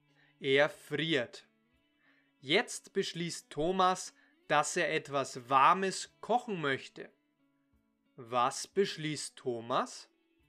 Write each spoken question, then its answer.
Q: Was beschließt Thomas?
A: Er beschließt, dass er etwas Warmes kochen möchte.